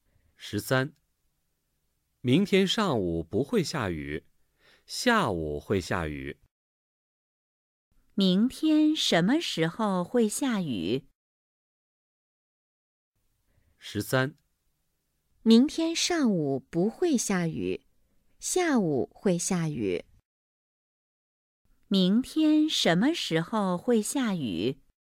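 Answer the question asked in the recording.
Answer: 下午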